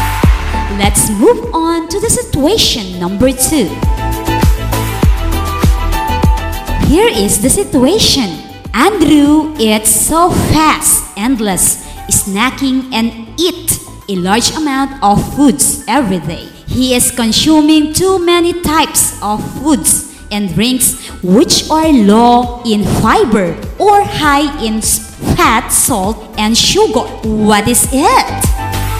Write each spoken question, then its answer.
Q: What is it?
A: Overnutrition.